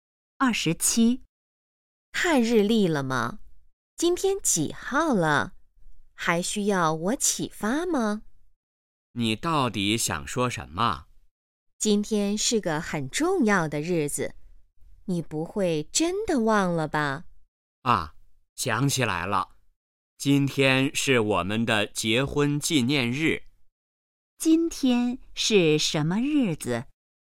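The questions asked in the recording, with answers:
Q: 今天是什么日子?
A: 结婚纪念日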